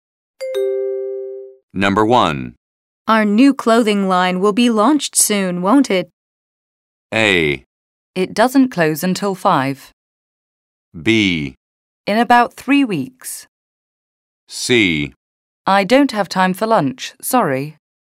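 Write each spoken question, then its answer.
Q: Our new clothing line will be launched soon, won't it?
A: B: In about 3 weeks.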